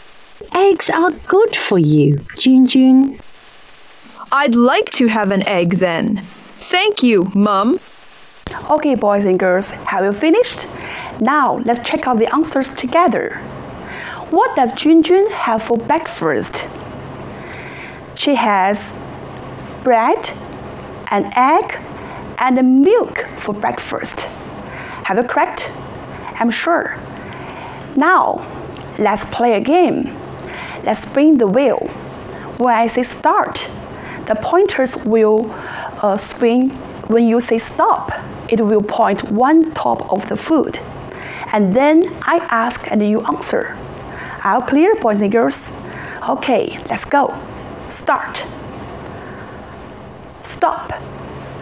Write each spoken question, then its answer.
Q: What does Junjun have for breakfast?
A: She has bread, an egg, and milk for breakfast.